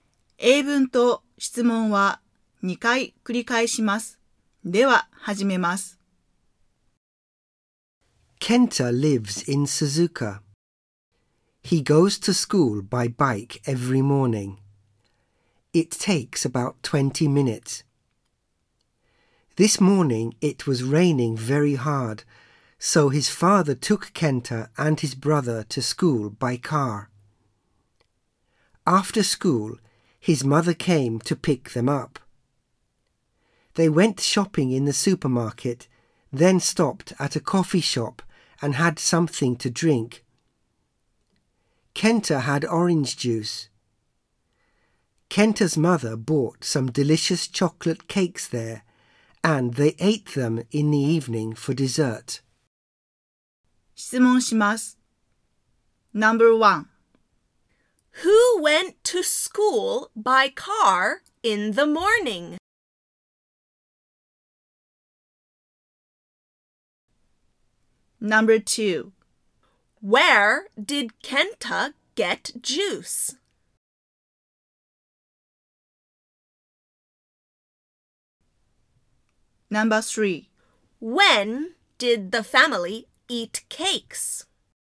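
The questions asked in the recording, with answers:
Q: Who went to school by car in the morning?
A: Kenta and his brother

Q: Where did Kenta get juice?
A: At a coffee shop

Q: When did the family...Eat cakes.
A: In the evening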